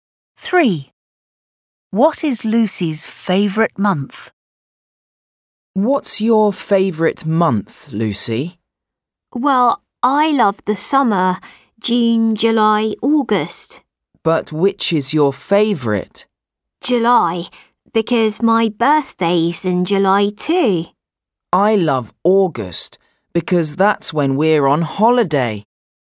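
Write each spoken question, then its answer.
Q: What is Lucy's favourite month?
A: July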